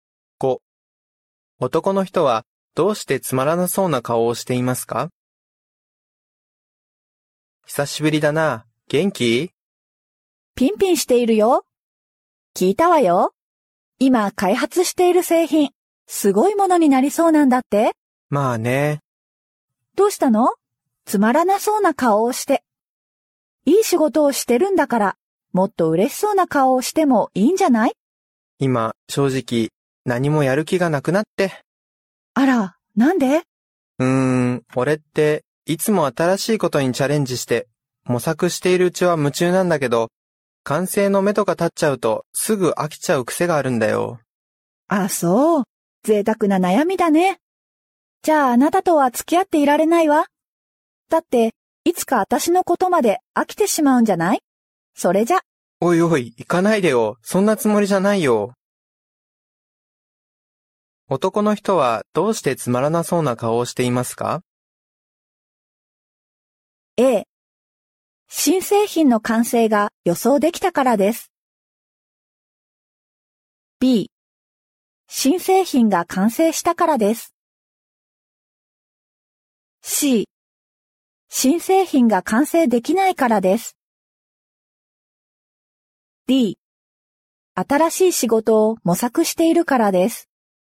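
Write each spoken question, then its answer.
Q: 男の人はどうしてつまらなそうな顔をしていますか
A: A、新製品の完成が予想できたからです。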